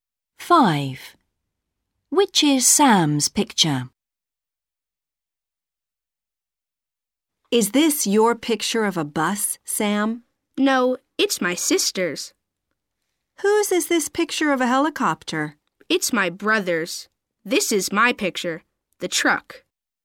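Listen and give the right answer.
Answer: the truck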